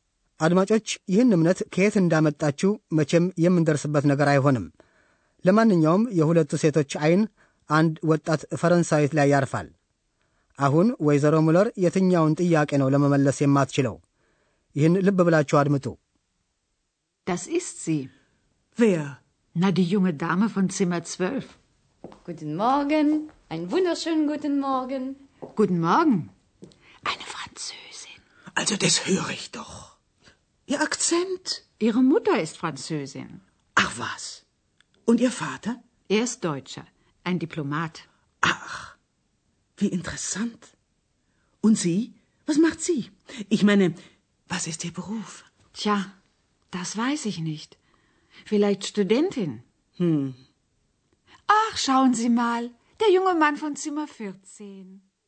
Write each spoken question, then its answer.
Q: አሁን ወይዘሮ ሙለር የትኛውን ጥያቄ ነው ለመመለስ የማትችለው?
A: ወይዘሮ ምሎር ለመመለስ የማትችለው ሙያን የሚመለከተውን ጥያቄ ነው።